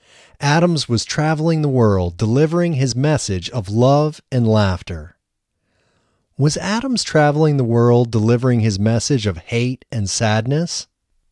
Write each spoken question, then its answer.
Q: Was Adams traveling the world delivering his message of hate and sadness?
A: No, Adams was not traveling the world delivering his message of hate and sadness.